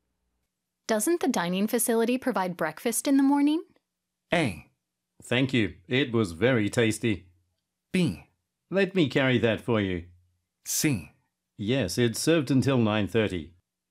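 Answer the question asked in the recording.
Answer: C: Yes, it's served until 9:30.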